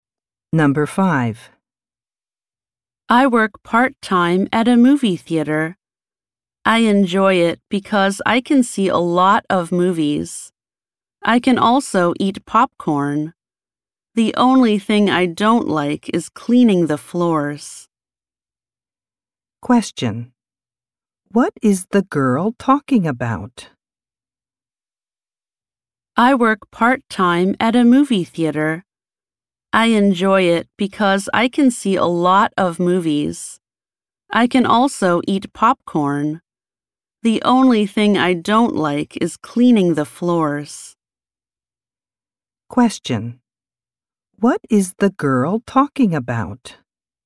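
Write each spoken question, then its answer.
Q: What is the girl talking about?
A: Her part-time job at a movie theater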